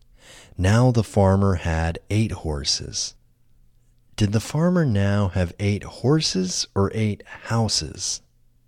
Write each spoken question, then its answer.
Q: Did the farmer now have 8 horses or 8 houses?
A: The farmer now had 8 horses.